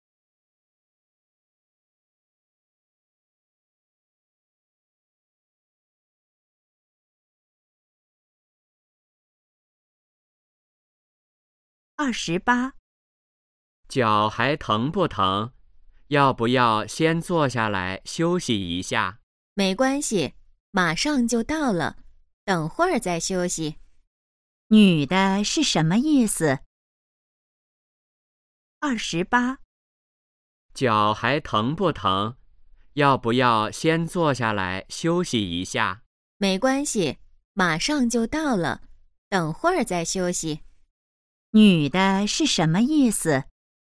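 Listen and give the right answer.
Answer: 先不休息,快到了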